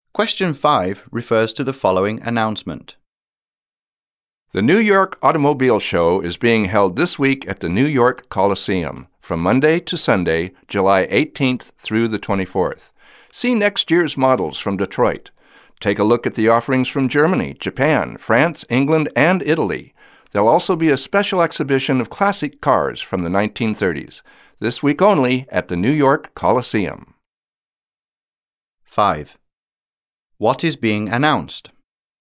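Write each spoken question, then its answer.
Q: What is being announced?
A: The New York Automobile Show (a car show at the New York Coliseum)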